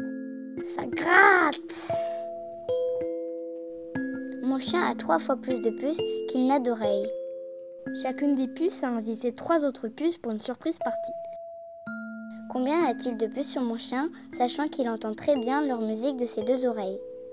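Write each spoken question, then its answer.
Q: Combien a-t-il de puces sur mon chien, sachant qu'il entend très bien leur musique de ses 2 oreilles?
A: 24 puces (6 puces + 18 invitées)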